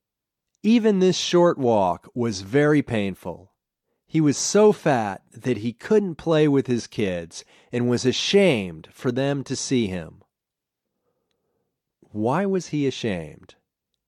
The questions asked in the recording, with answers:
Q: Why was he ashamed?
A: He was ashamed because he was so fat.